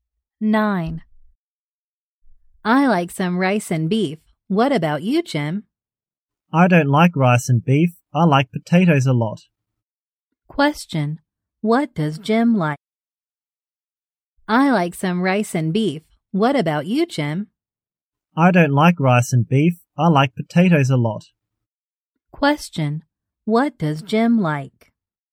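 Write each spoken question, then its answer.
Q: What does Jim like?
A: Potatoes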